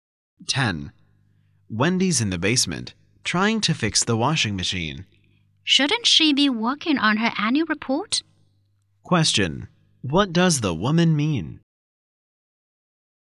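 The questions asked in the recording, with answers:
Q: What does the woman mean?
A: Wendy should be working on her annual report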